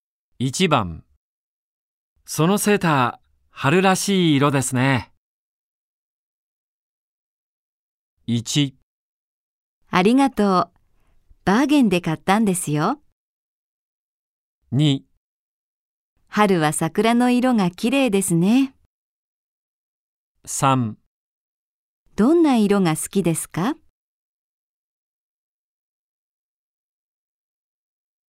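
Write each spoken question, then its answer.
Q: そのセーター、春らしい色ですね。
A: 1: ありがとう。バーゲンで買ったんですよ。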